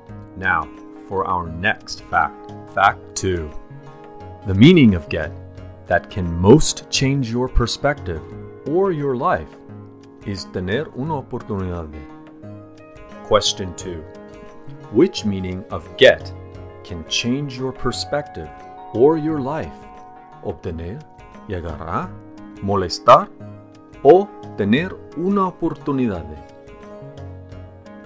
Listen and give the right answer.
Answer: The meaning of get that can most change your perspective or your life is tener una oportunidad de.